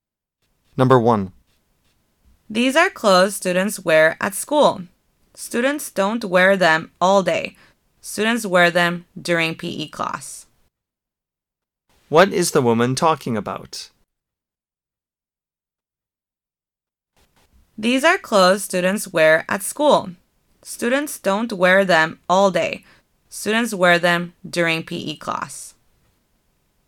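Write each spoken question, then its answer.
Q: What is the woman talking about?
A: PE clothes (gym clothes)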